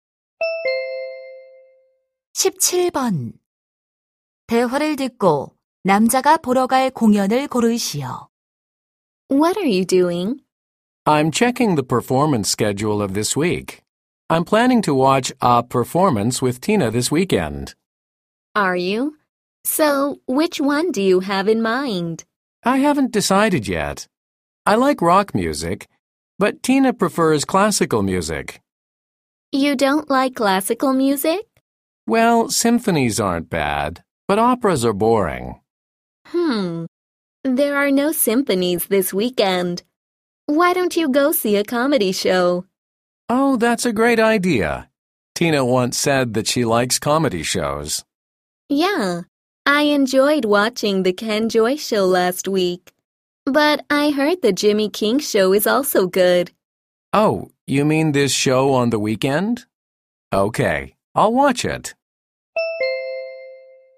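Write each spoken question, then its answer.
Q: 대화를 듣고 남자가 보러 갈 공연을 고르시오.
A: 주말에 하는 Jimmy King 코미디 쇼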